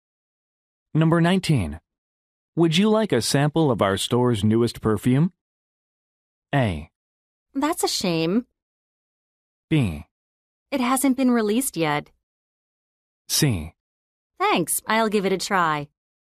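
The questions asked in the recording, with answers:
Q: Would you like a sample of our store's newest perfume?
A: C: Thanks, I'll give it a try.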